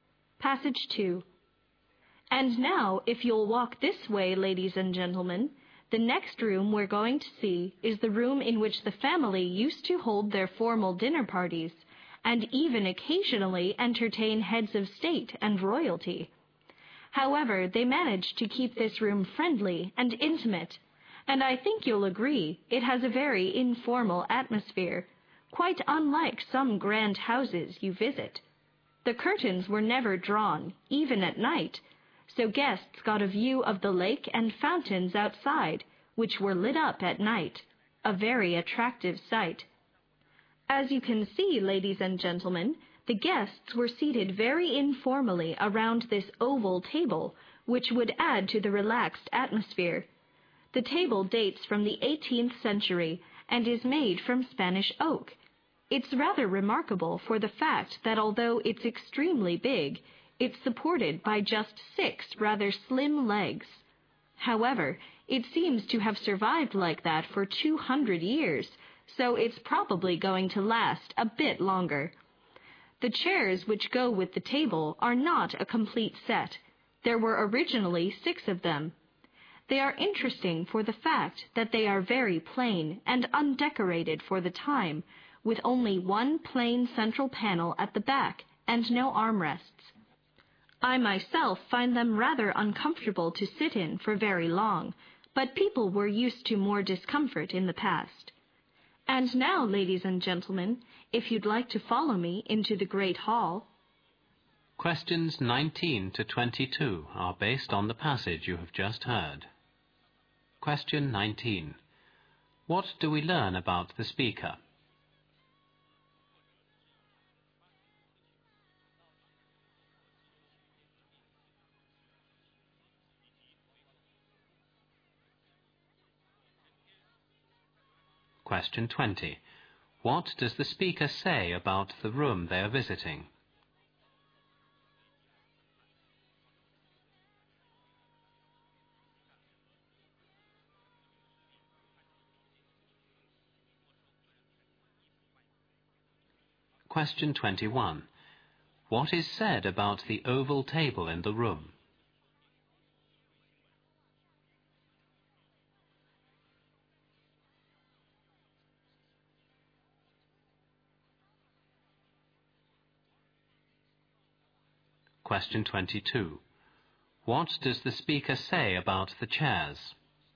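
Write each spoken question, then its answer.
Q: What do we learn about the speaker?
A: The speaker is a tour guide.

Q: What does the speaker say about the room they are visiting?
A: It has a friendly, informal atmosphere, and formal dinner parties were held there.

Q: What is said about the oval table in the room?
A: It is very big but is supported by just six slim legs.

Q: What does the speaker say about the chairs?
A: They are very plain and uncomfortable.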